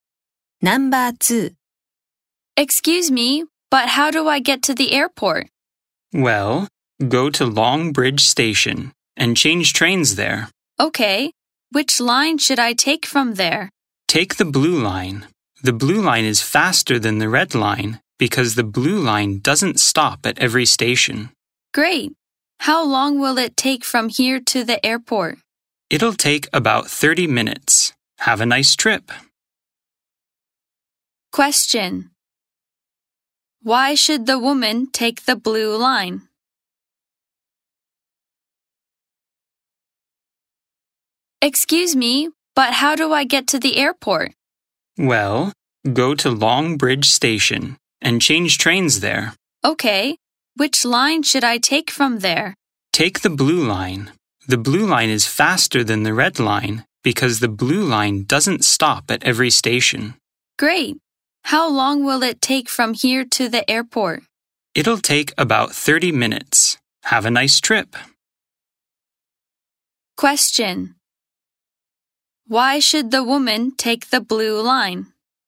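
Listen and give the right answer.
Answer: Because it is faster; it doesn't stop at every station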